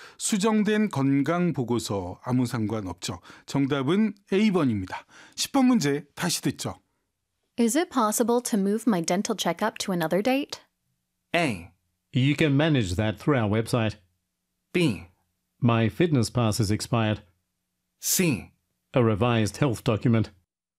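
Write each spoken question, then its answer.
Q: Is it possible to move my dental checkup to another date?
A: A: You can manage that through our website.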